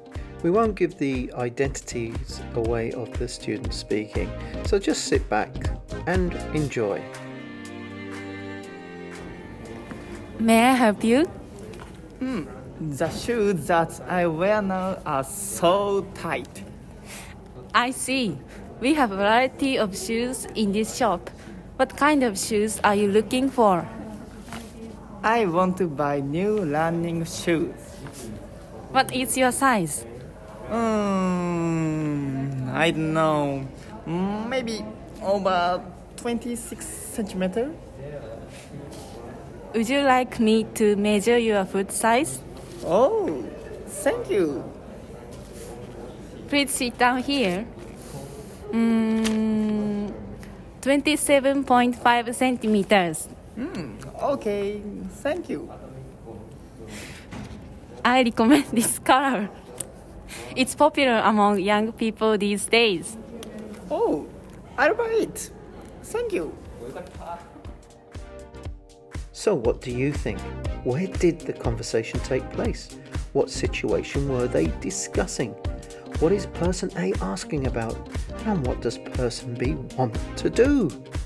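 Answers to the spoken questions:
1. In a shoe shop
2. Buying new running shoes because the current ones are too tight
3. What kind of shoes and what size B wants
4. Buy new running shoes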